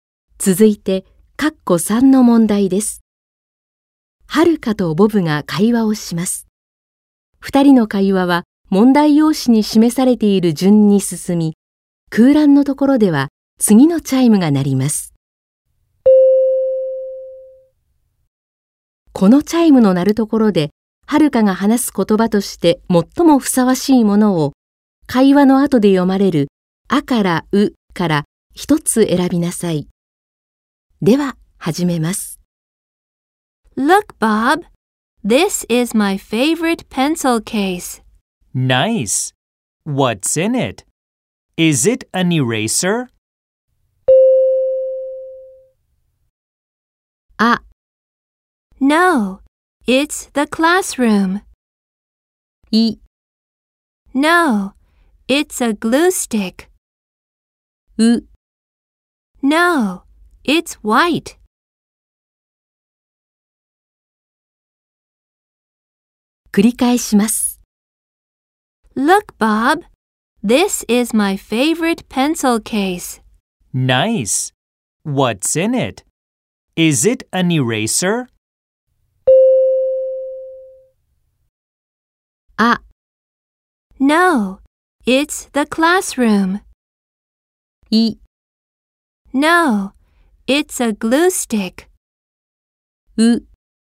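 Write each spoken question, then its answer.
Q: このチャイムの鳴るところで、はるかが話す言葉として最もふさわしいものを、会話の後で読まれる、あからうから一つ選びなさい。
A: い: No, it's a glue stick.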